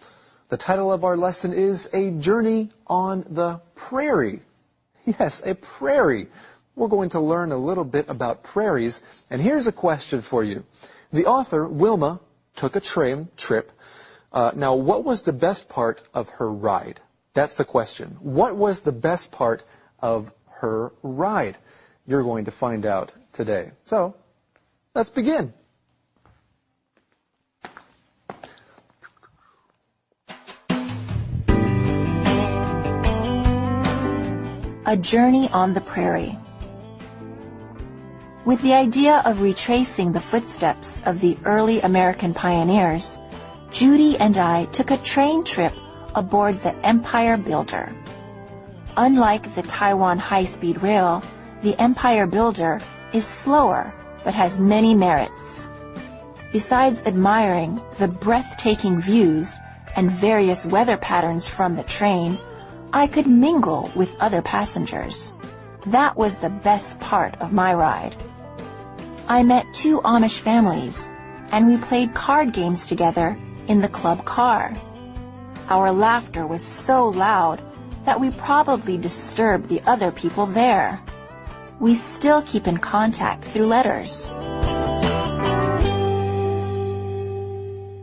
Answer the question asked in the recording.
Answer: It was mingling with other passengers.